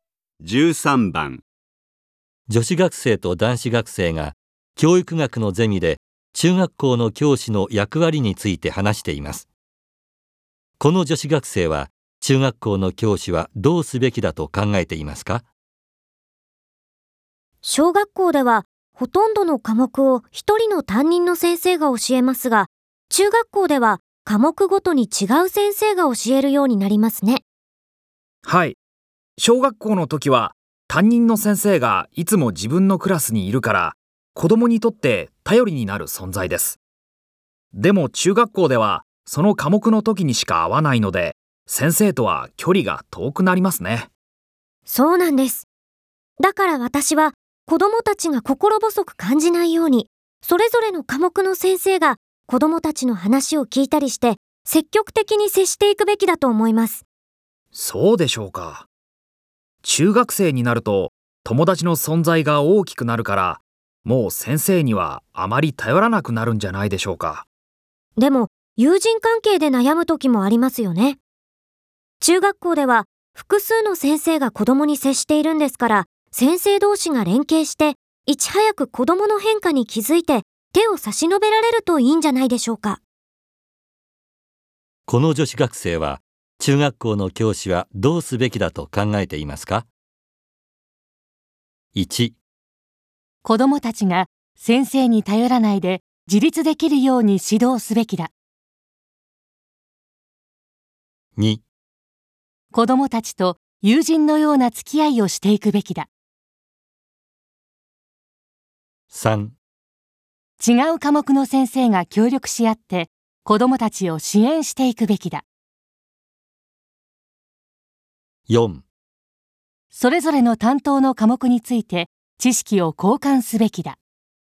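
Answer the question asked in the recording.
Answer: 3: 違う科目の先生が協力し合って子供たちを支援していくべきだ。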